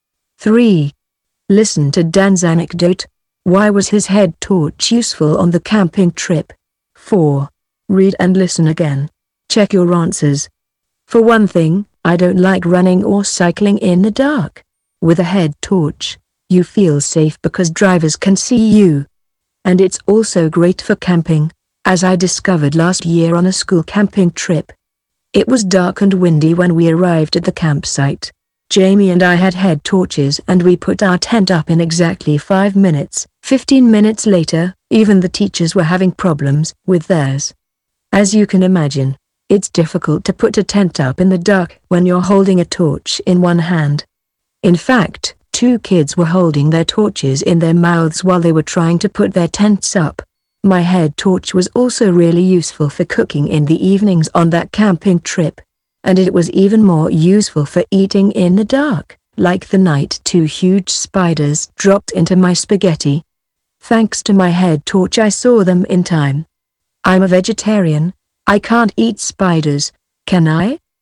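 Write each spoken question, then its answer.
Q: Why was his head torch useful on the camping trip?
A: Because he could see in the dark: he put up his tent quickly, cooked and ate in the dark, and saw the spiders in his spaghetti in time.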